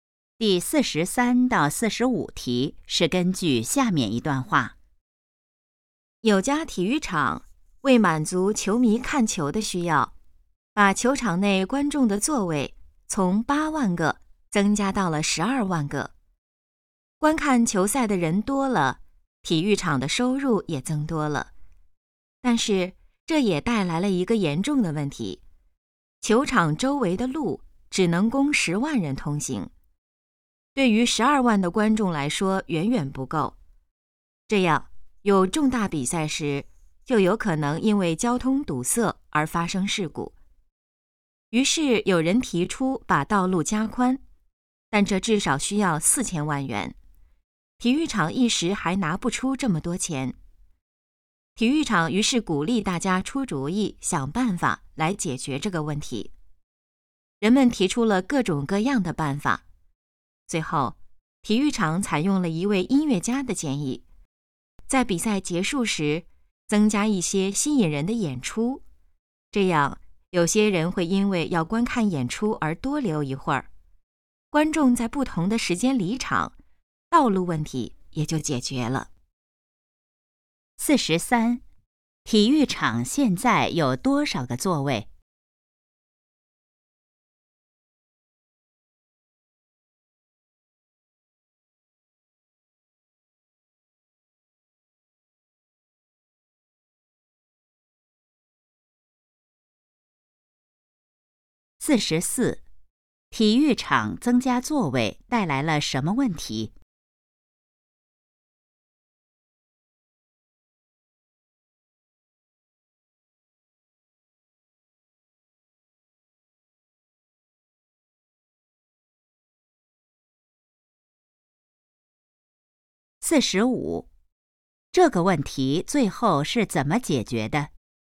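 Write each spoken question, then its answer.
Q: 体育场现在有多少个座位?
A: 12万个

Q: 体育场增加座位带来了什么问题?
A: 交通问题,周围的路不够通行

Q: 这个问题最后是怎么解决的?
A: 比赛结束时增加演出,让观众在不同时间离场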